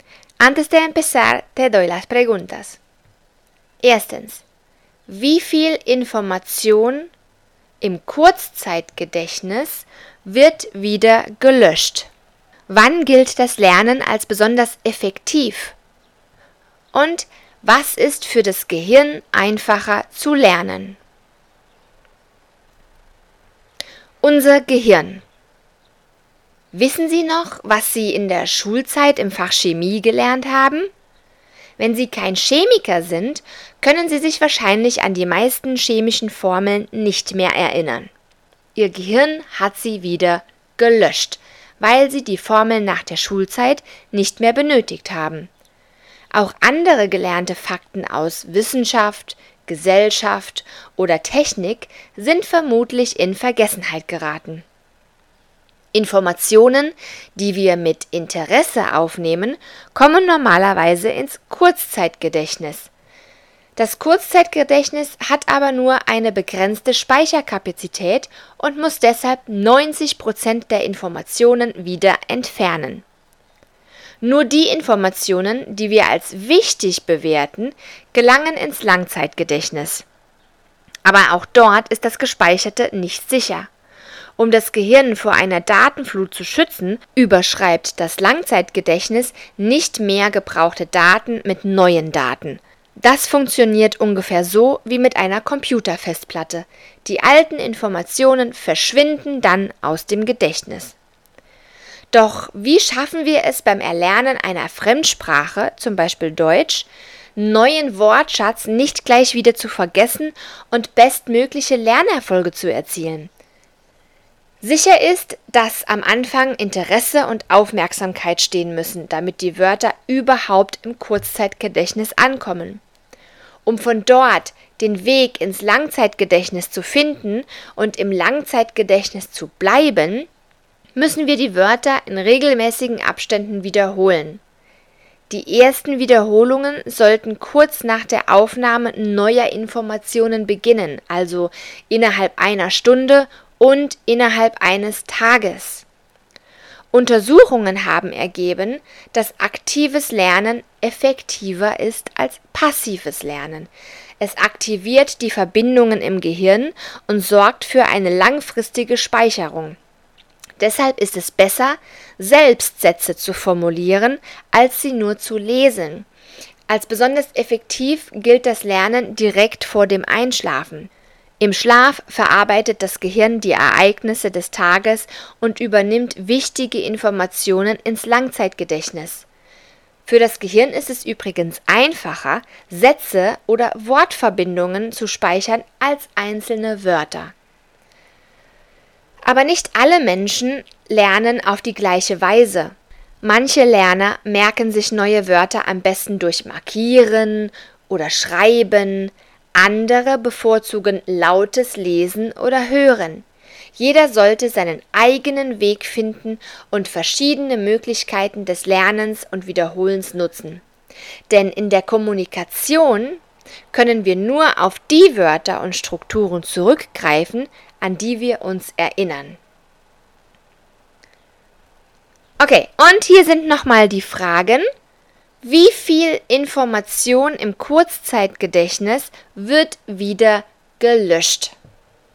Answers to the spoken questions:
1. Das waren 90 Prozent.
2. vor dem Einschlafen.
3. Das sind ganze Sätze und Wortverbindungen.